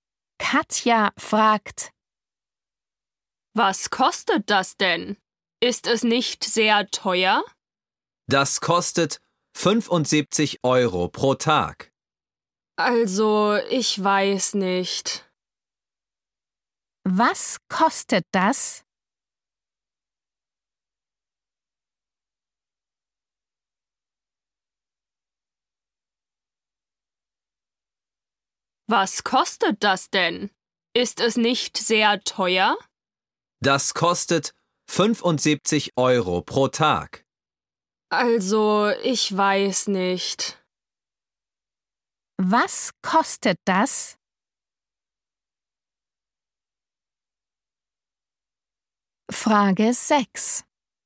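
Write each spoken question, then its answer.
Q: Was kostet das?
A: 75 Euro pro Tag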